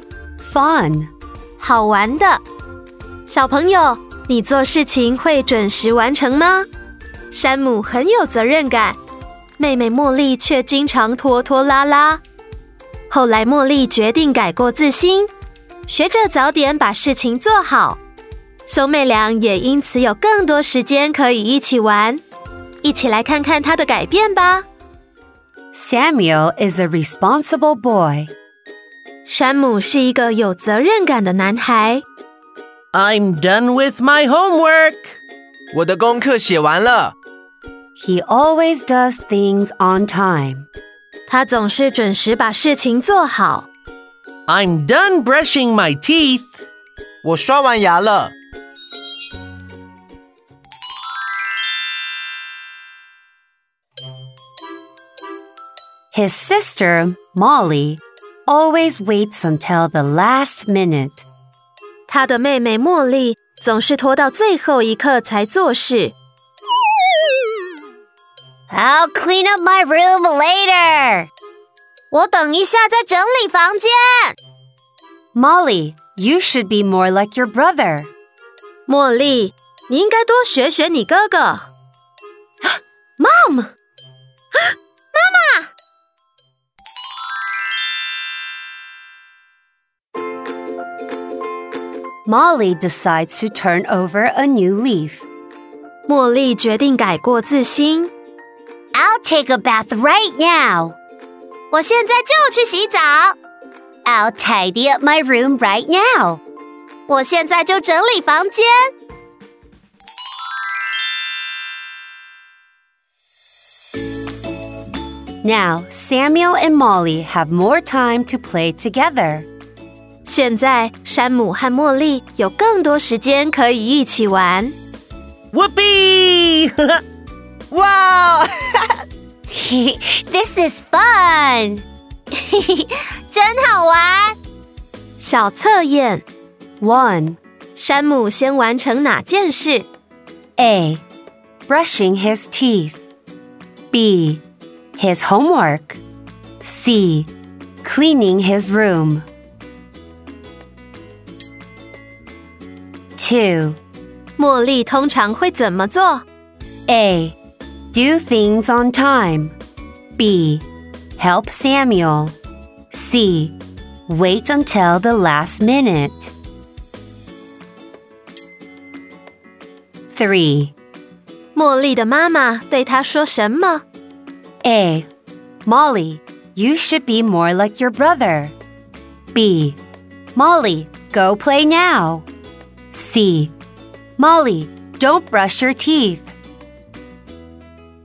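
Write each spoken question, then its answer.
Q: 山姆先完成哪件事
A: B: His homework

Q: 茉莉通常会怎么做?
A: C: Wait until the last minute.

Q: 茉莉的妈妈对她说什么?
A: A: Molly, you should be more like your brother.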